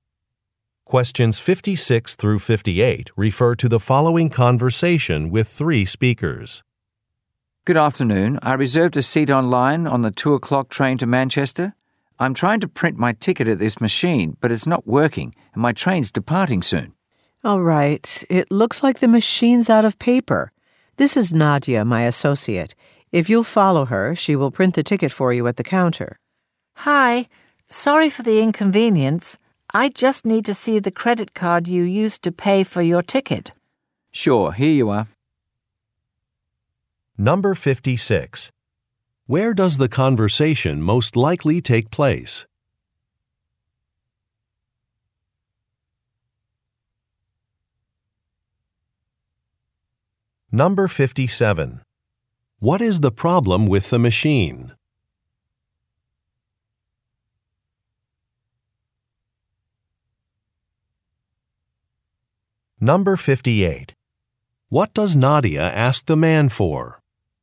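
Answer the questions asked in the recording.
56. At a train station
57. It is out of paper
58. The credit card he paid with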